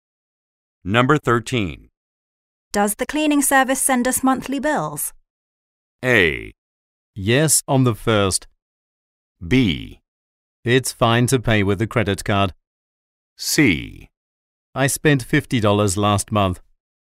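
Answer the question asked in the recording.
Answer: A: Yes, on the 1st.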